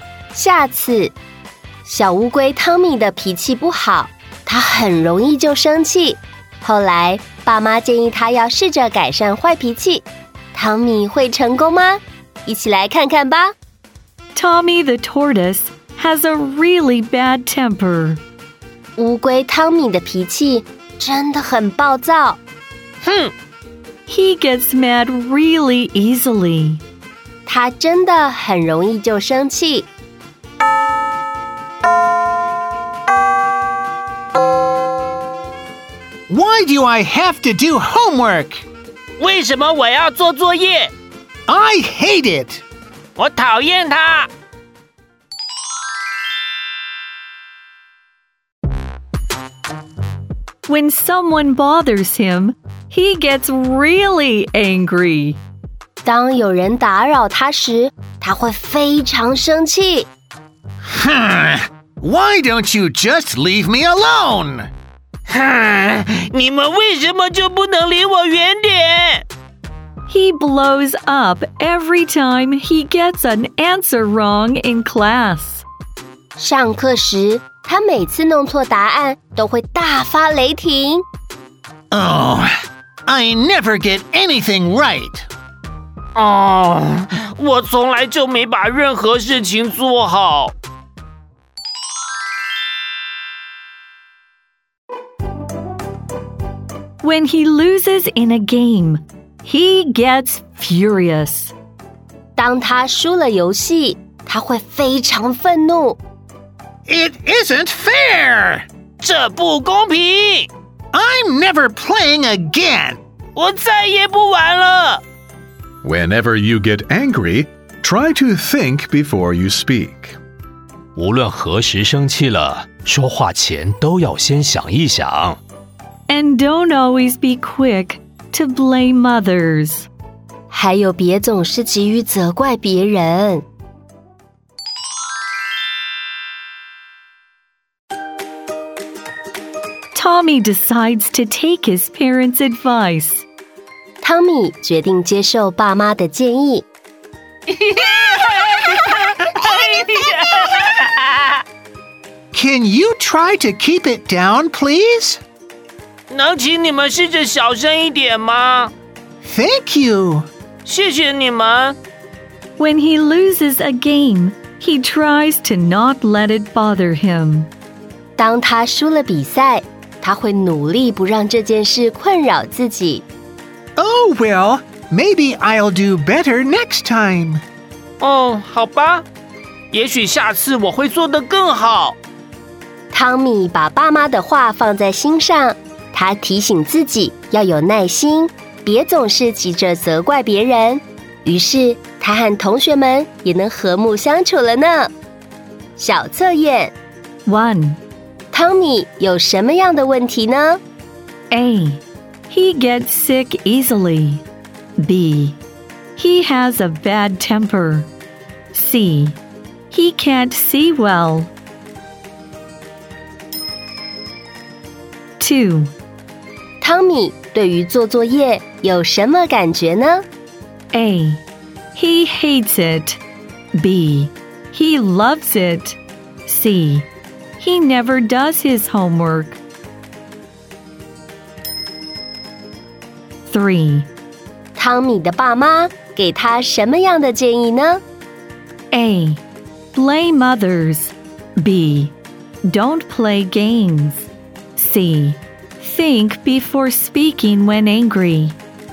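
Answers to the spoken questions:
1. B: He has a bad temper.
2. A: He hates it.
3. C: Think before speaking when angry.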